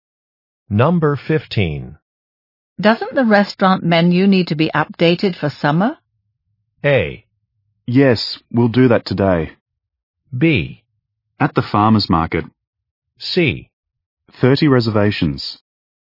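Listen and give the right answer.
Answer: A: Yes, we'll do that today.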